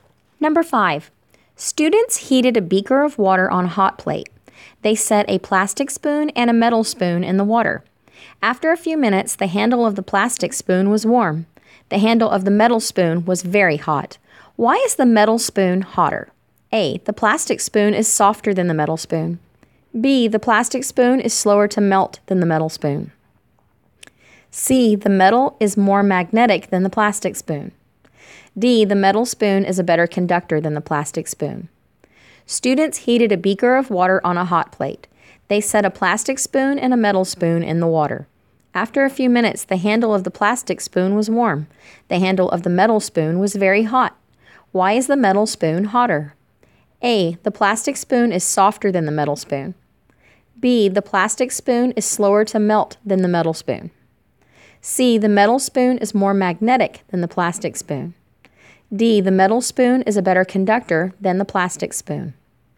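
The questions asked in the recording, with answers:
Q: Why is the metal spoon hotter?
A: D: The metal spoon is a better conductor than the plastic spoon.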